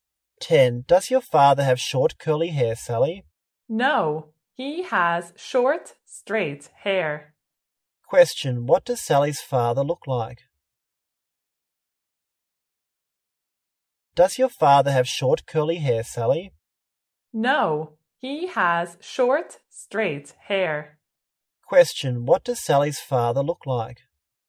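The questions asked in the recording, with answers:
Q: What does Sally's father look like?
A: He has short straight hair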